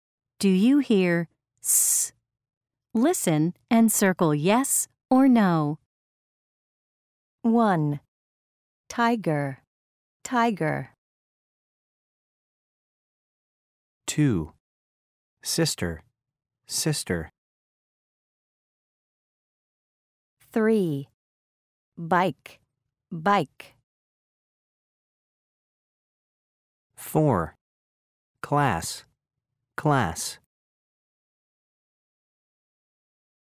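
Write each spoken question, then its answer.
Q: Tiger, tiger.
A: no

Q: Sister, sister.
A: yes

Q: Bike, bike.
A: no

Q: Class, class.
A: yes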